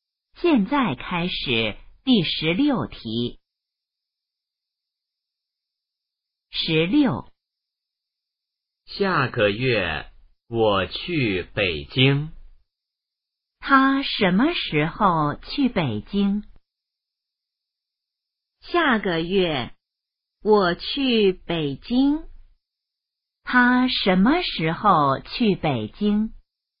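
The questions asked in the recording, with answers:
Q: 他什么时候去北京?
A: 下个月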